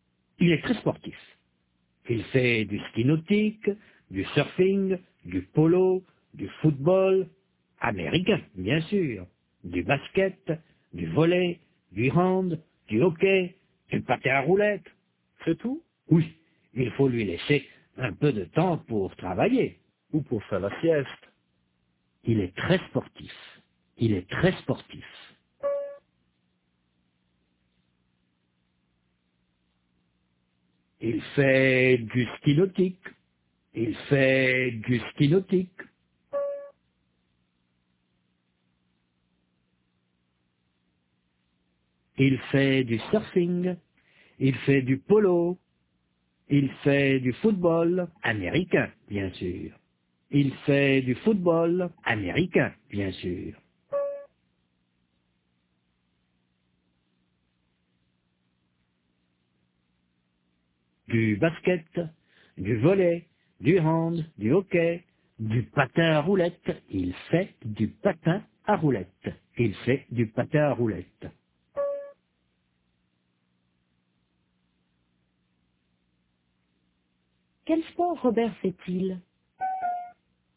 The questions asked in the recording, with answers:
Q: Quel sport Robert fait-il?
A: Il fait du ski nautique, du surfing, du polo, du football américain, du basket, du volley, du hand, du hockey, du patin à roulettes.